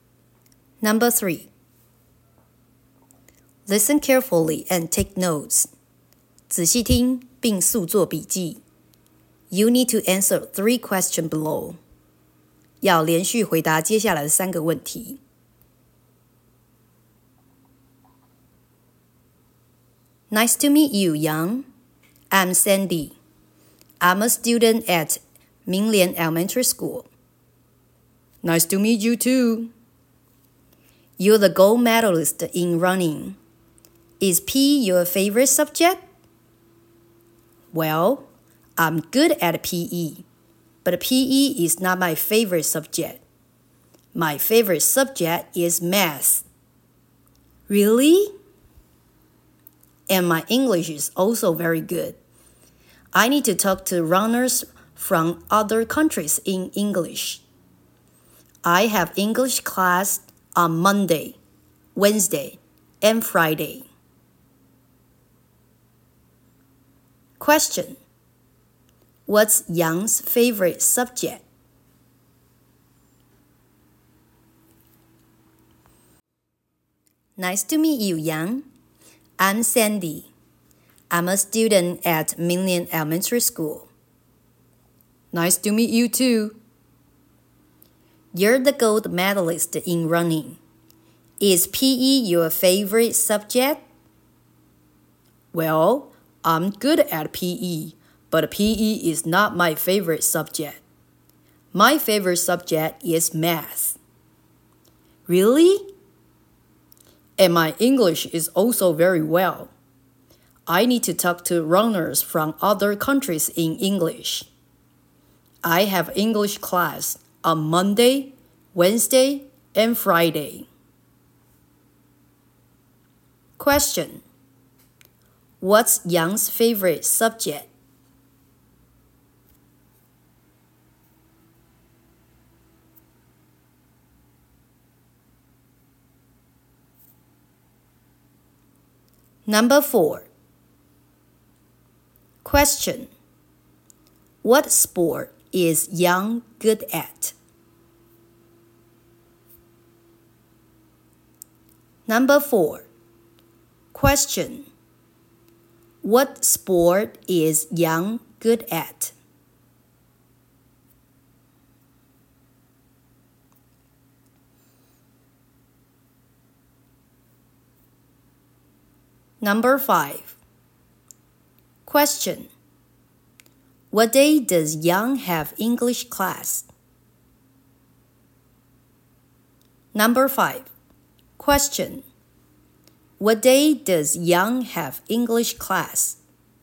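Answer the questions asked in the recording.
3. Math
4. Running
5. Monday, Wednesday, and Friday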